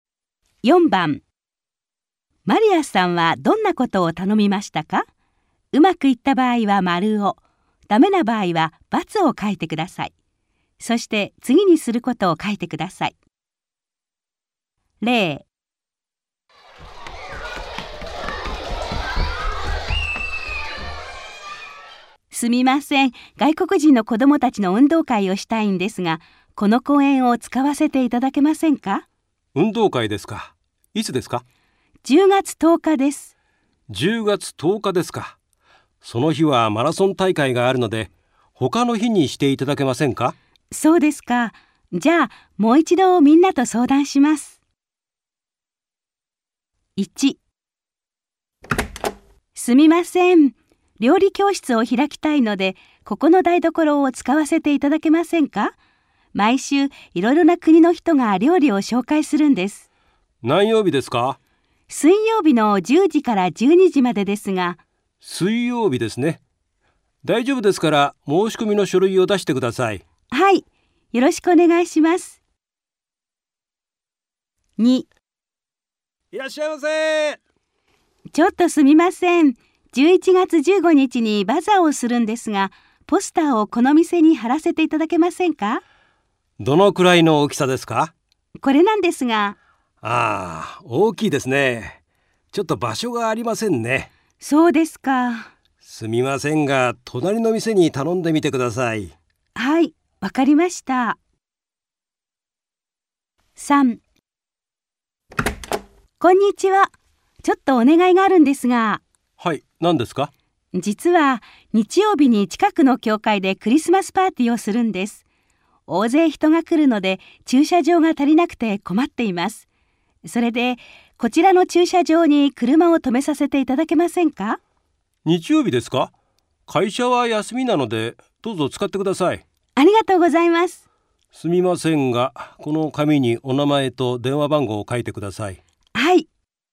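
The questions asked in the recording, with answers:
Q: マリアさんはどんなことを頼みましたか?うまくいった場合は丸を、ダメな場合は×を書いてください。そして次にすることを書いてください。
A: 台所を使わせてもらうこと(料理教室):○、申し込みの書類を出す

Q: マリアさんはどんなことを頼みましたか?うまくいった場合は丸を、ダメな場合は×を書いてください。そして次にすることを書いてください。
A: 店にバザーのポスターを貼らせてもらうこと:×、隣の店に頼む

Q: マリアさんはどんなことを頼みましたか?うまくいった場合は丸を、ダメな場合は×を書いてください。そして次にすることを書いてください。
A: 駐車場に車を止めさせてもらうこと:○、紙に名前と電話番号を書く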